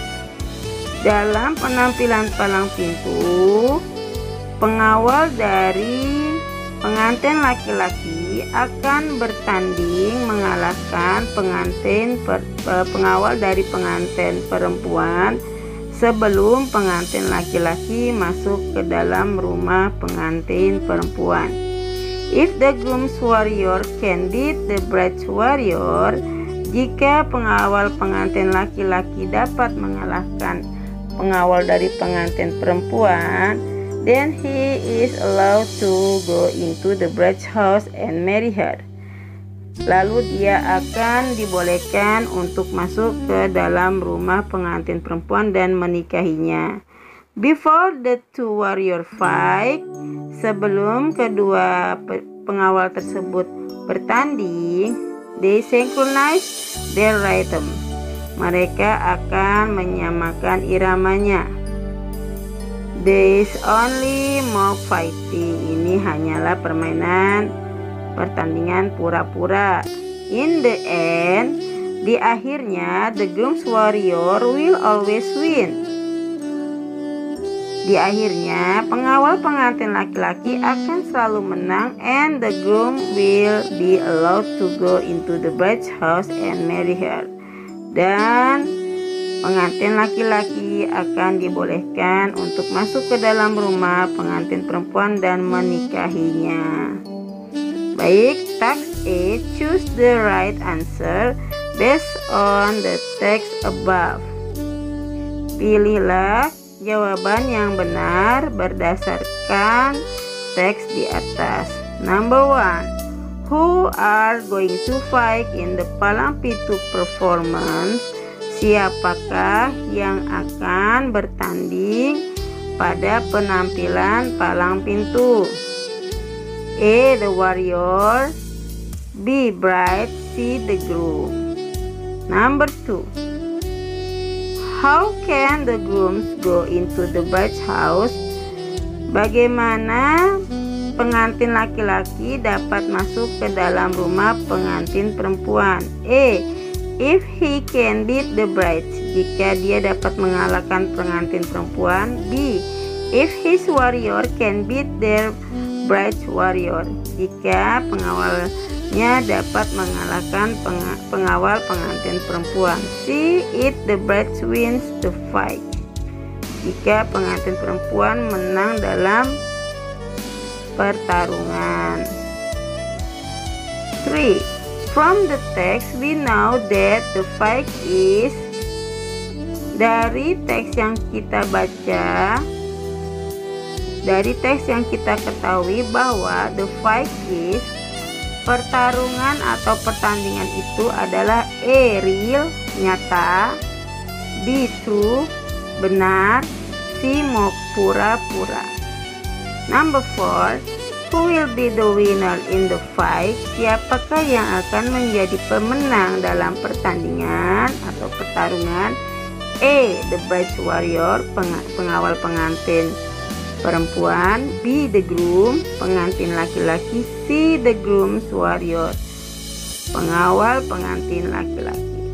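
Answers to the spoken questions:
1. A: The warrior
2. B: If his warrior can beat the bride's warrior
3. C: pura-pura (mock)
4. C: the groom warrior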